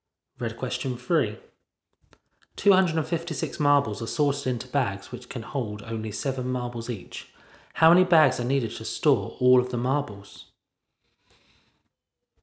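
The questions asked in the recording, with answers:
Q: How many bags are needed to store all of the marbles?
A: 37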